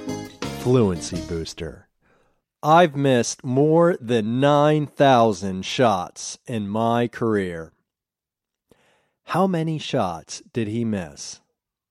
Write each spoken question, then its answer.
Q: How many shots did he miss?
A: He missed 9,000 shots.